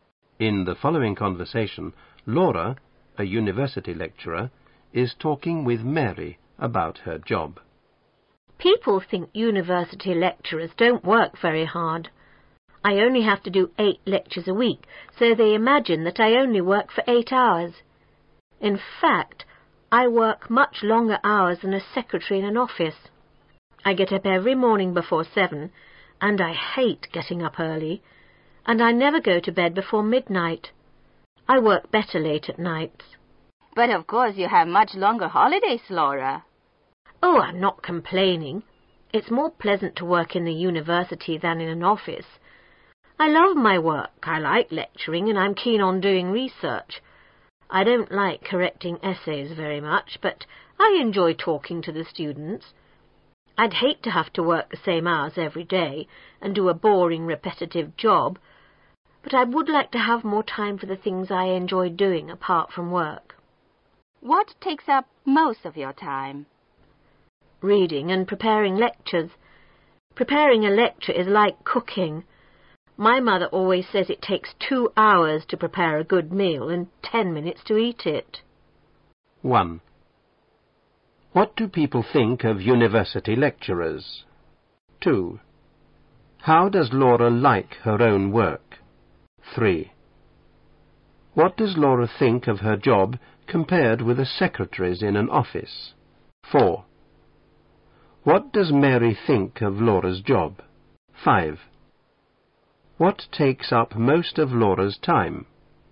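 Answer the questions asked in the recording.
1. They don't work very hard
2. She loves it
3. She works much longer hours, but it is more pleasant
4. She has much longer holidays
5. Reading and preparing lectures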